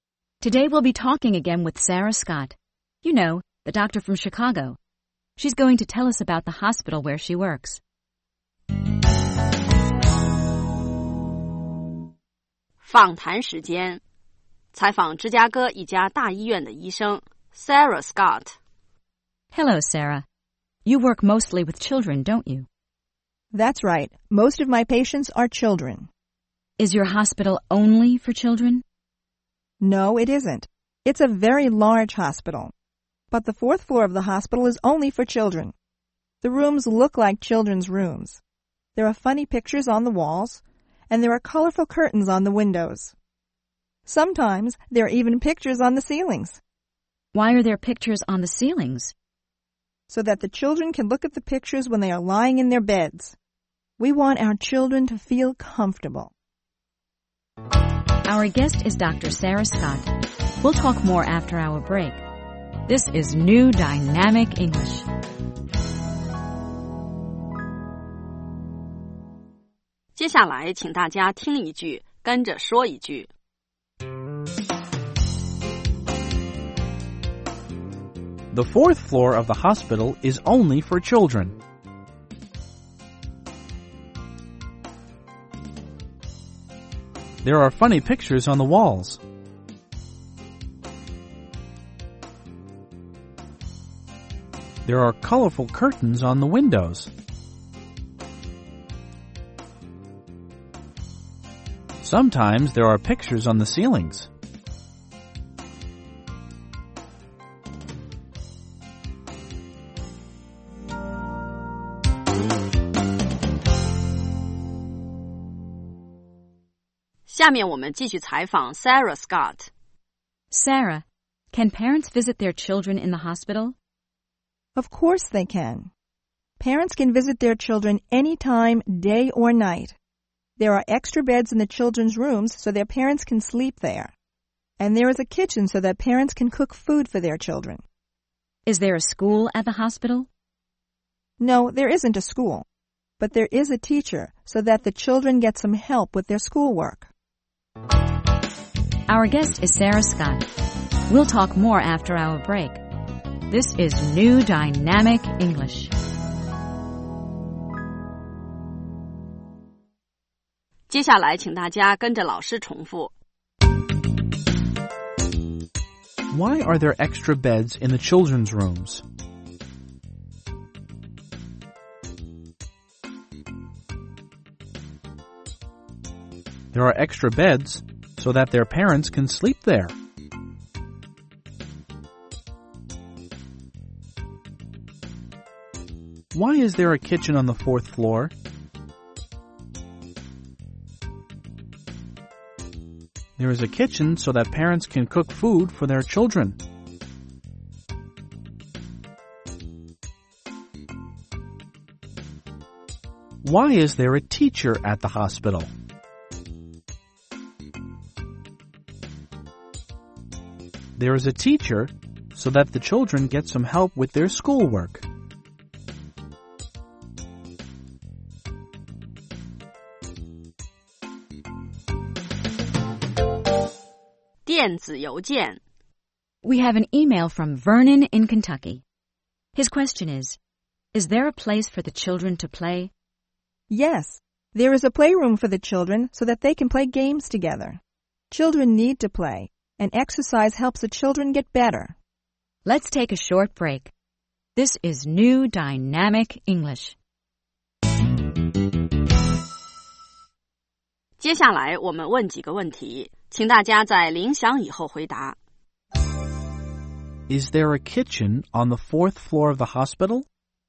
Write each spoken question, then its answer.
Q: Is there a kitchen on the fourth floor of the hospital?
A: Yes, there is. There is a kitchen so that parents can cook for their children.